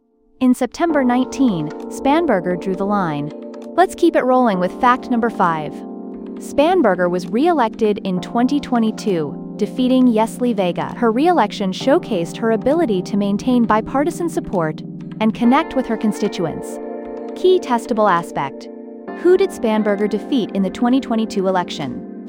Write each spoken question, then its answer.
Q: who did Spanberger defeat in the 2022 election?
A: Yesley Vega.